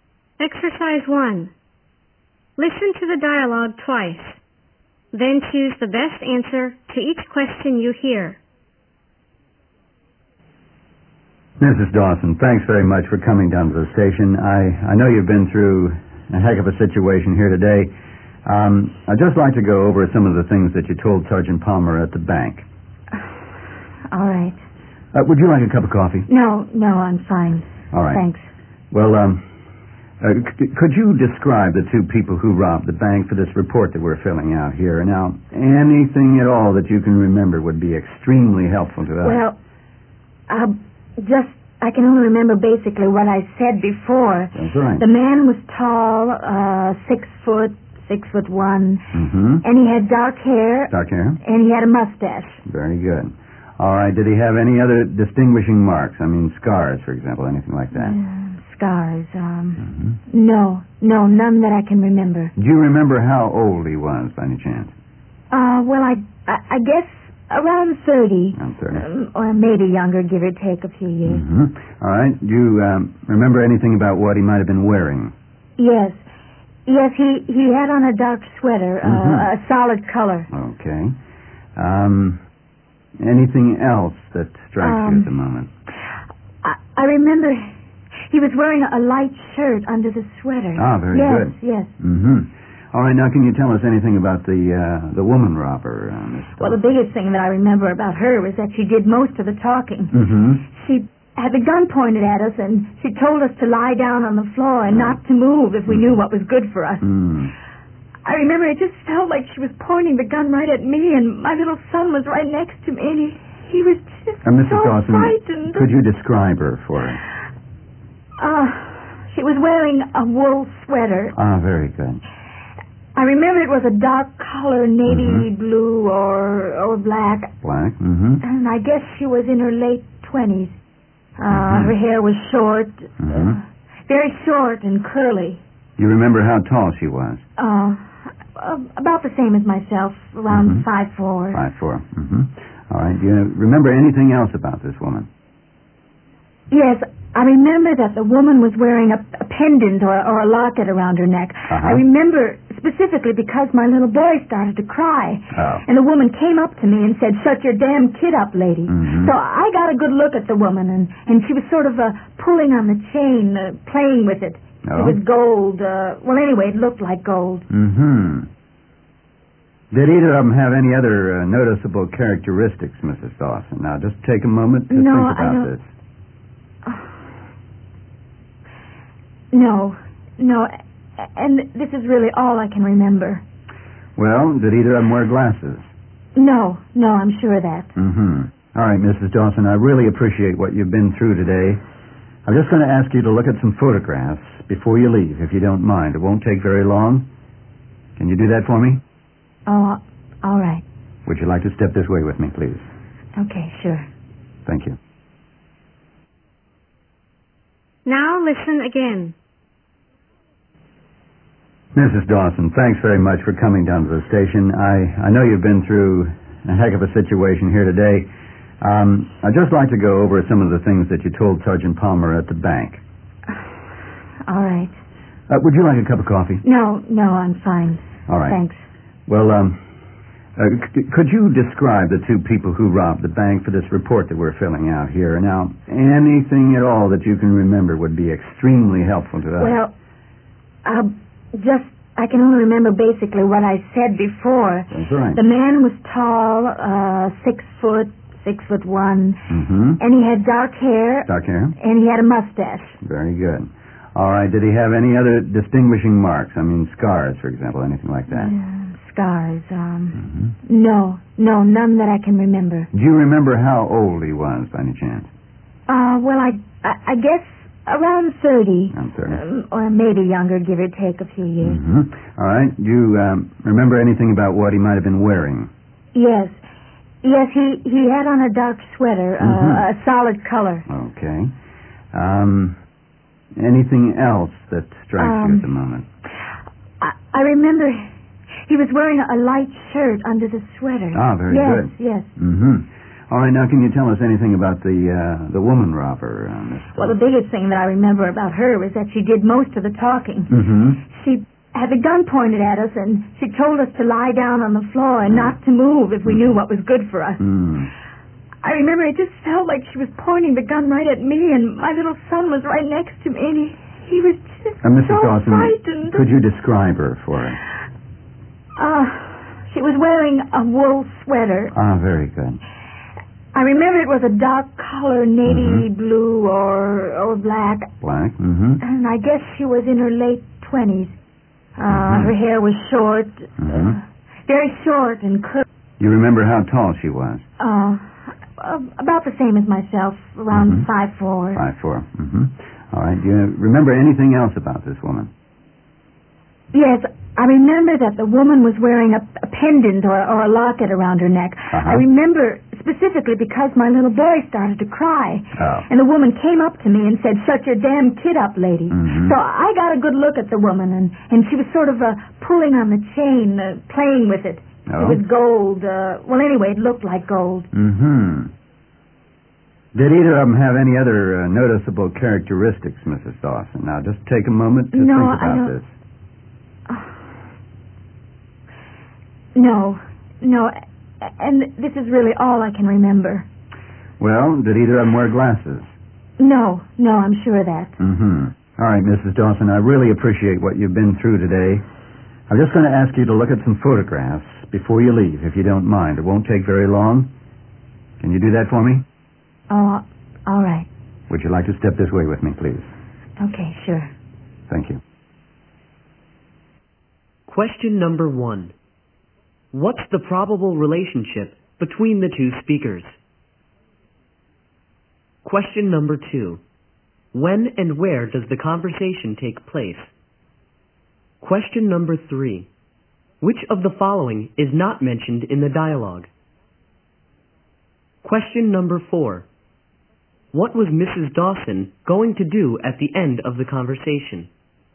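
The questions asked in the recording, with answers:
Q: What's the probable relationship between the two speakers?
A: A police officer and a witness to a bank robbery

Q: When and where does the conversation take place?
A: At the police station, on the day of the bank robbery

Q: What was Mrs. Dawson going to do at the end of the conversation?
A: Look at some photographs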